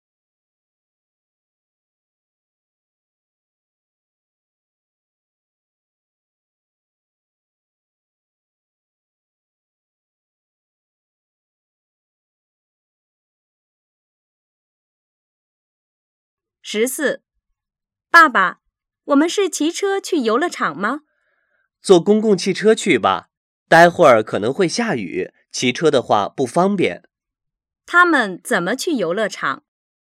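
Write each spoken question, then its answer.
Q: 他们怎么去游乐场?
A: 坐公共汽车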